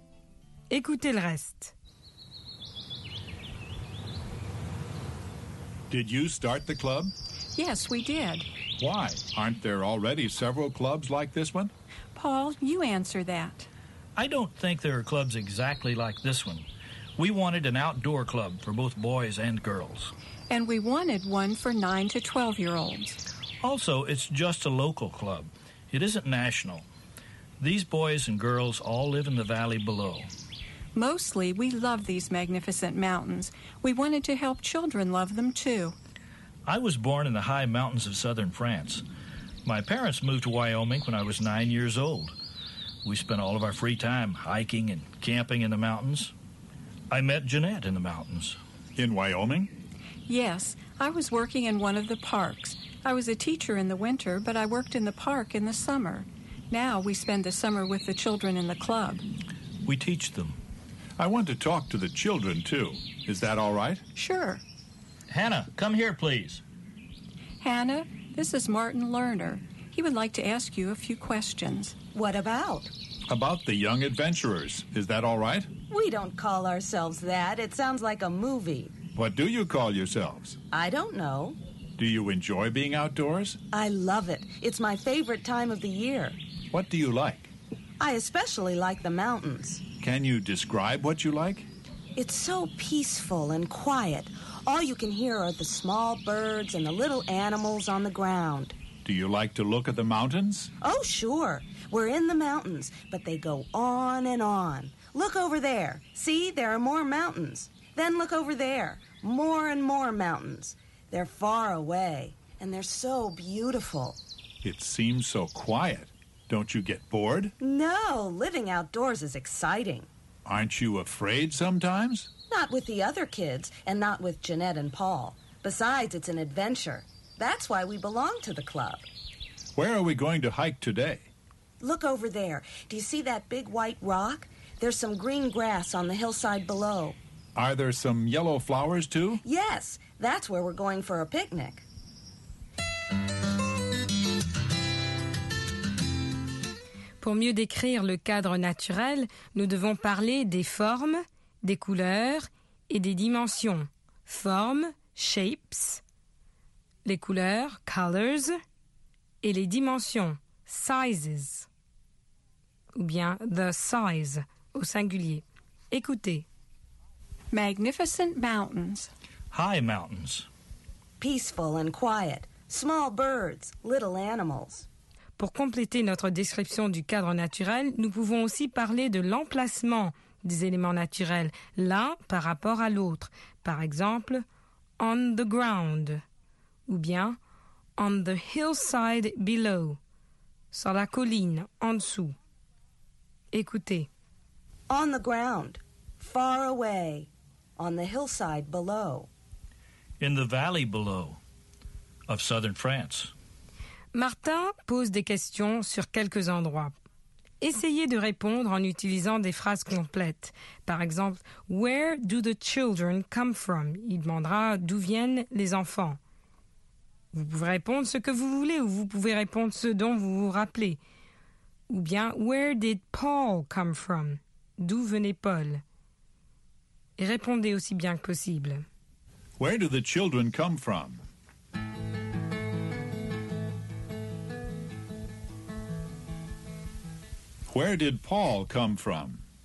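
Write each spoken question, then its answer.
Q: Where do the children come from?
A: They live in the valley below.

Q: Where did Paul come from?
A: The high mountains of southern France.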